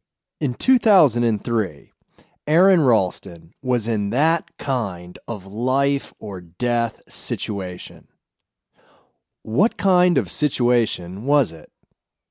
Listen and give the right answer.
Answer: It was a life or death situation.